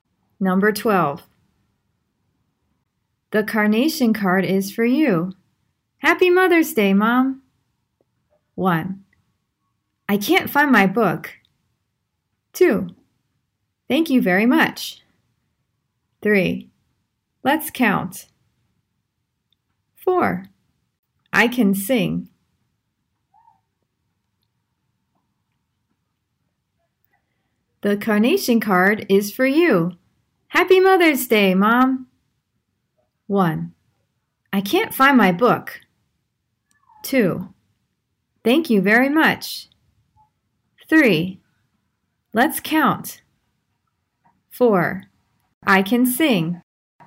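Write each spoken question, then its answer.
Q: The carnation card is for you.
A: 2: Thank you very much.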